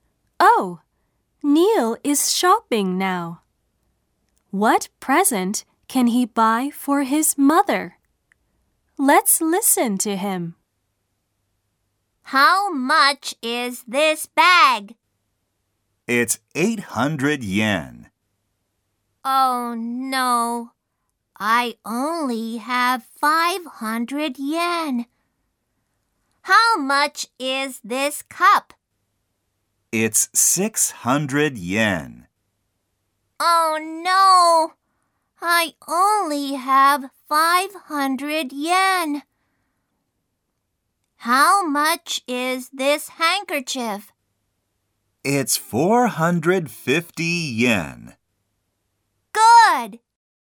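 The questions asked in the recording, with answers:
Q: What present can he buy for his mother?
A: A handkerchief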